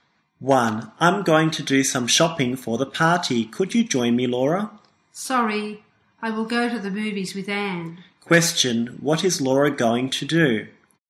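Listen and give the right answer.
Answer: Go to the movies with Anne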